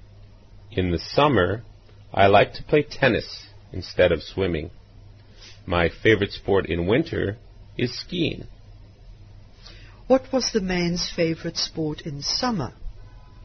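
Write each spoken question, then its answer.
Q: What was the man's favorite sport in summer?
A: Tennis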